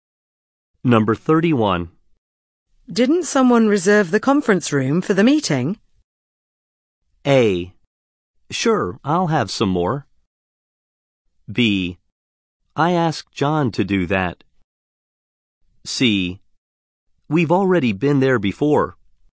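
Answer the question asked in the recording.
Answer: B: I asked John to do that.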